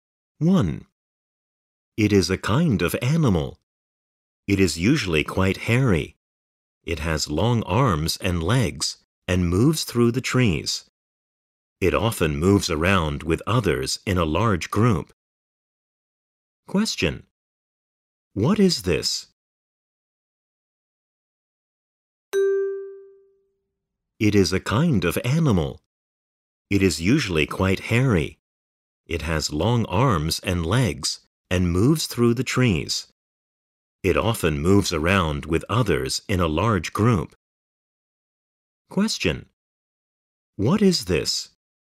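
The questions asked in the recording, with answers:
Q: What is this?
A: A monkey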